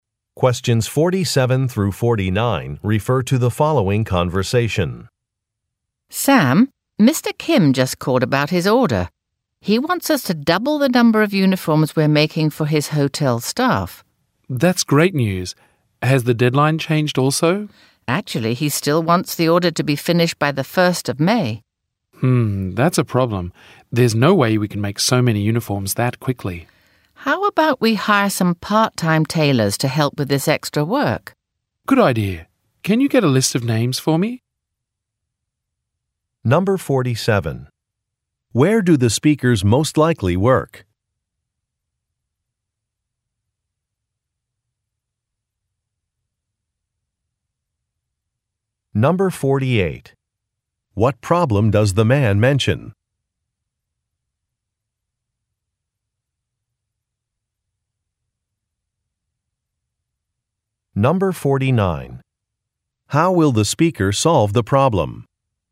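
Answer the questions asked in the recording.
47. At a uniform maker (clothing manufacturer)
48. They can't make so many uniforms by the deadline
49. By hiring part-time tailors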